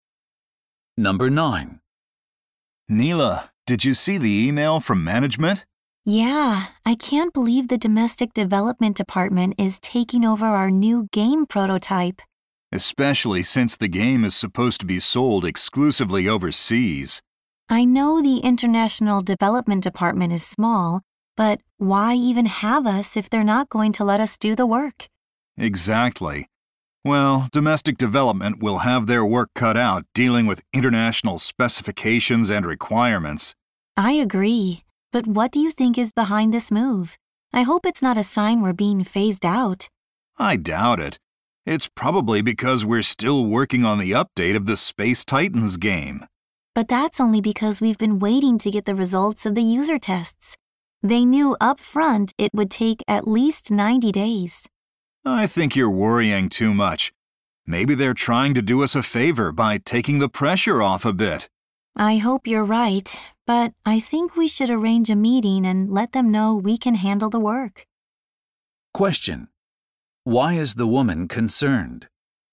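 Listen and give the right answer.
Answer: She fears their international development department may be phased out after domestic development took over their game prototype.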